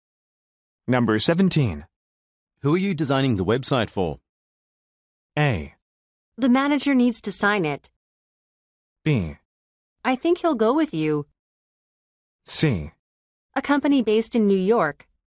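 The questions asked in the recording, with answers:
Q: Who are you designing the website for?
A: C: A company based in New York.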